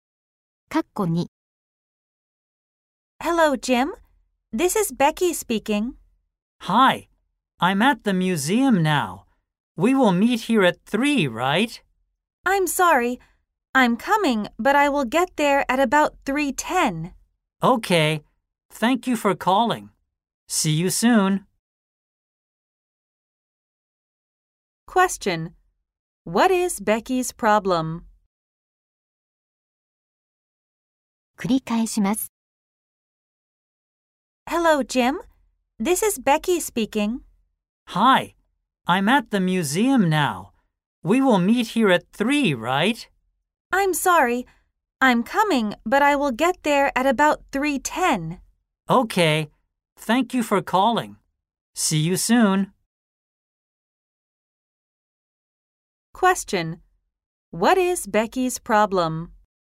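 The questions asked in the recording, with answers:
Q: What is Becky's problem?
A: She will be late; she will get to the museum at about 3:10.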